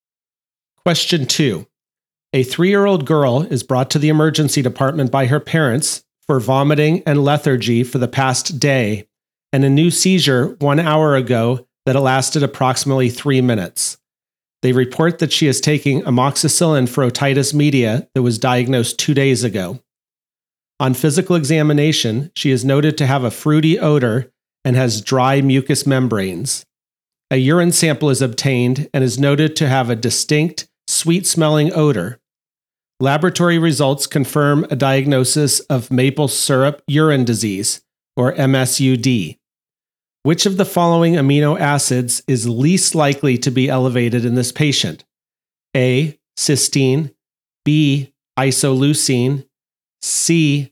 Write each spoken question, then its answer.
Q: Which of the following amino acids is least likely to be elevated in this patient?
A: The correct answer is A.